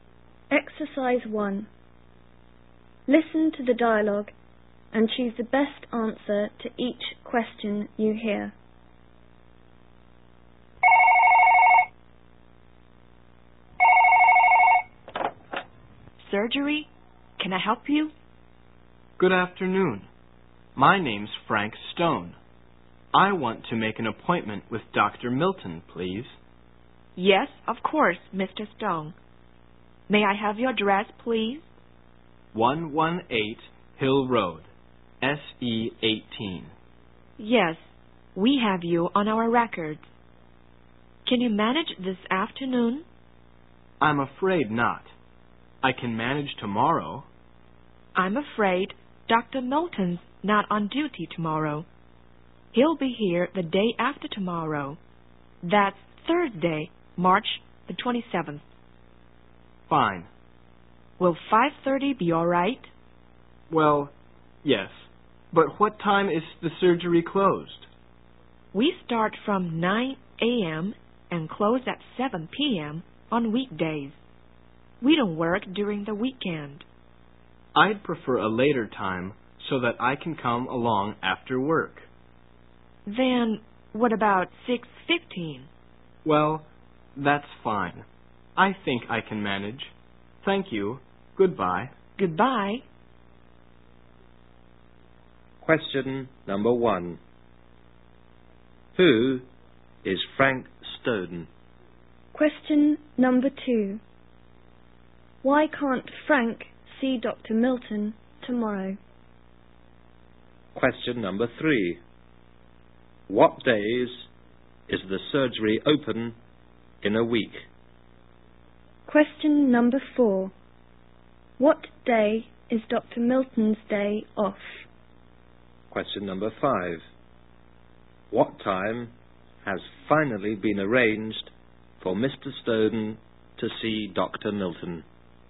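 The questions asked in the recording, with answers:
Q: Who is Frank Stone?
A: A patient wanting an appointment with Dr. Milton

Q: Why can't Frank see Dr. Milton tomorrow?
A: Dr. Milton is not on duty tomorrow

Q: What days is the surgery open in a week?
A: Weekdays (Monday to Friday)

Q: What time has finally been arranged for Mr. Stone to see Dr. Milton?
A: 6:15 on Thursday, March 27th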